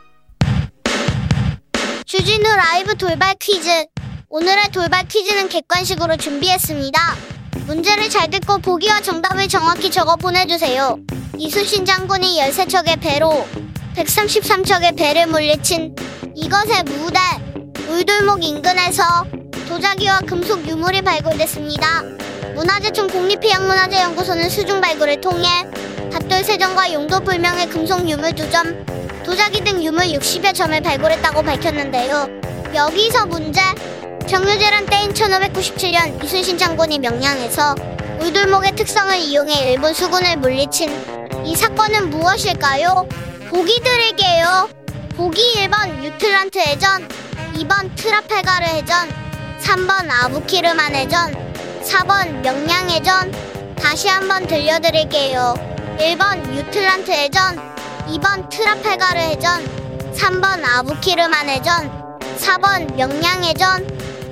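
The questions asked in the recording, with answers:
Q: 정유재란 때인 1597년 이순신 장군이 명량에서 울돌목의 특성을 이용해 일본 수군을 물리친 이 사건은 무엇일까요?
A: 4: 명량 해전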